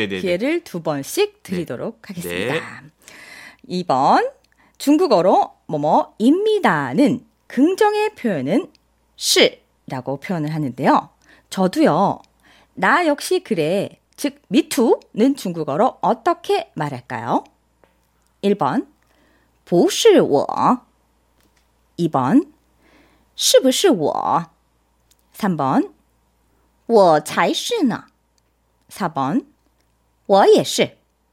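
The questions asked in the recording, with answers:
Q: 저도요. 나 역시 그래. 즉 미투는 중국어로 어떻게 말할까요?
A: 4: 我也是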